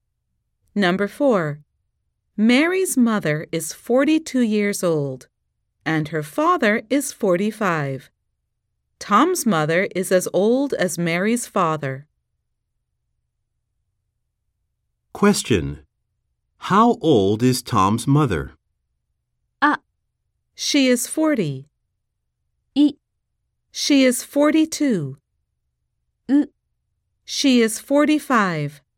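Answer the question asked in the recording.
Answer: C: She is 45.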